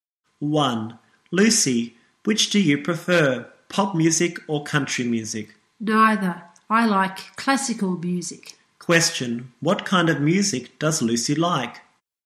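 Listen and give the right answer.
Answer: Classical music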